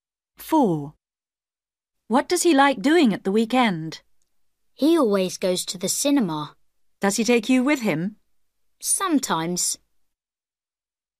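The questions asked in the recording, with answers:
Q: What does he like doing at the weekend?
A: Going to the cinema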